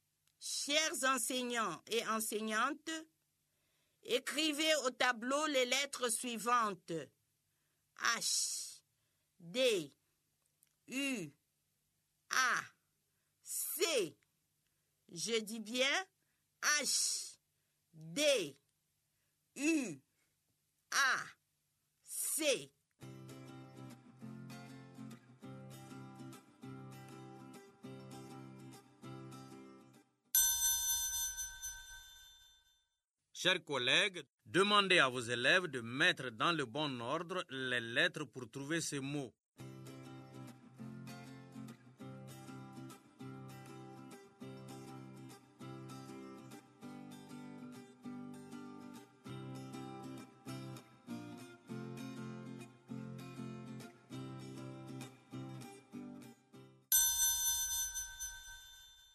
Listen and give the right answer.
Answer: Monsieur, c'est chaud.